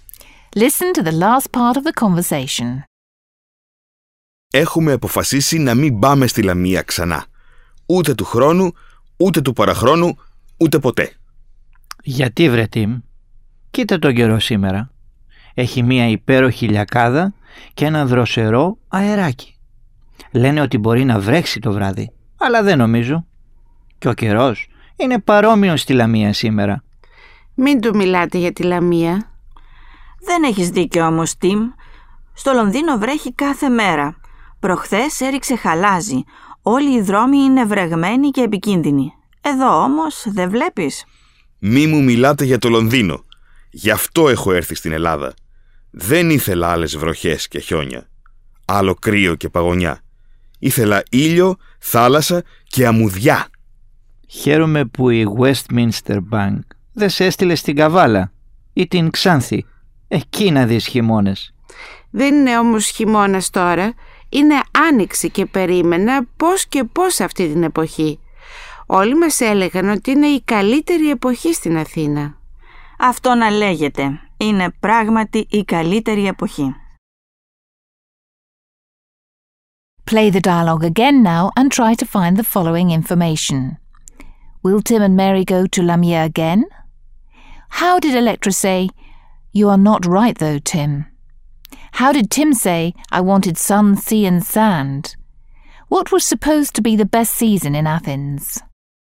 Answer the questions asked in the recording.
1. The answer to the first question is that Tim and Mary will not go to Lamia again.
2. "Δεν έχεις δίκιο όμως, Tim,"
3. Ήθελα ήλιο, θάλασσα και αμμουδιά,
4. Spring was supposed to be the best season in Athens.